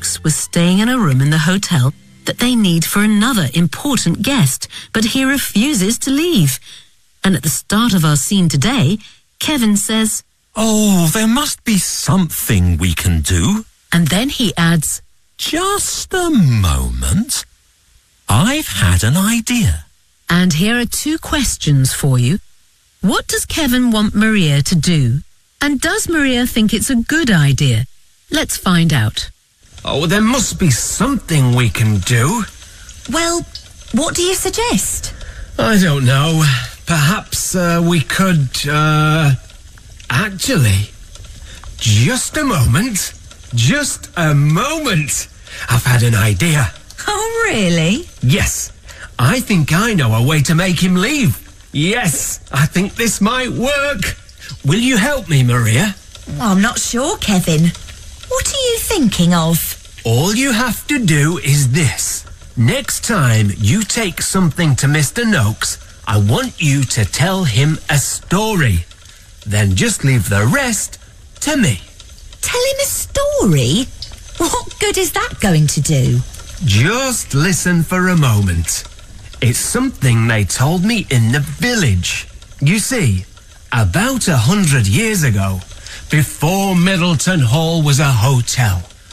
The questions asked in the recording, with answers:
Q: What does Kevin want Maria to do?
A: Noakes, I want you to tell him a story.